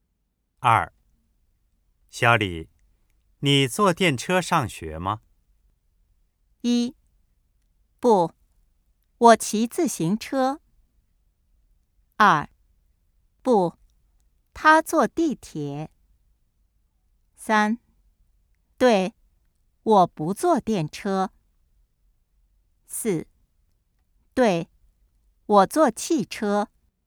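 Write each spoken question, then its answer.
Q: 小李,你坐电车上学吗?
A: 一: 不,我骑自行车。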